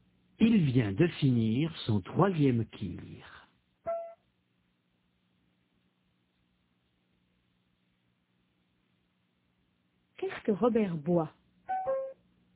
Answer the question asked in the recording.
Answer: Un tir.